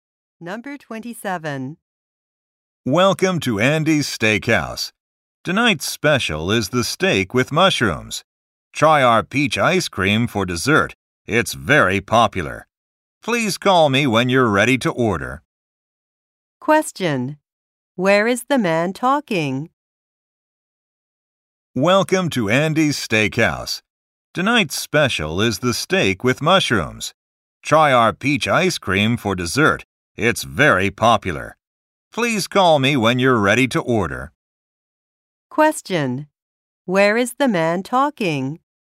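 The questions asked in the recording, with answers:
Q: Where is the man talking?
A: At a restaurant (steakhouse).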